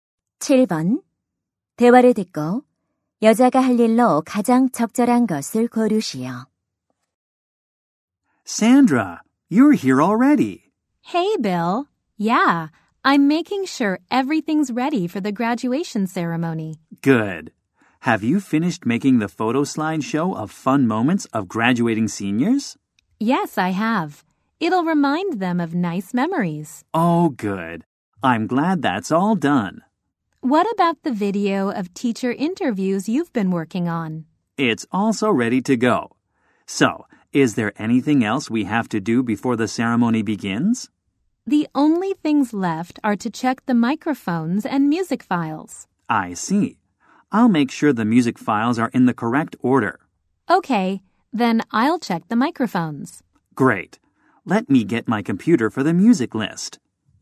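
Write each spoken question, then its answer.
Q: 대화를 듣고 여자가 할 일로 가장 적절한 것을 고르시오.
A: 마이크 점검하기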